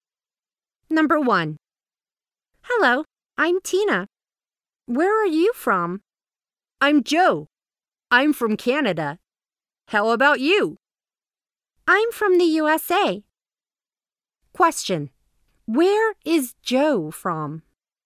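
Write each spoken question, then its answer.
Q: Where is Joe from?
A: Canada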